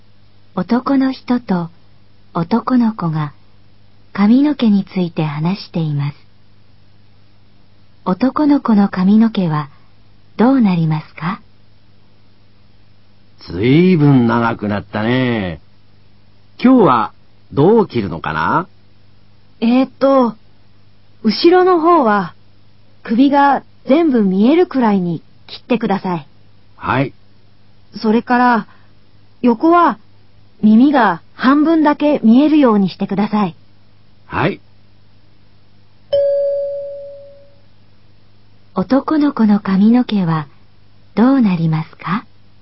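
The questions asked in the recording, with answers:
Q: 男の子の髪の毛はどうなりますか?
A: 後ろは首が全部見えるくらい短く、横は耳が半分見える長さ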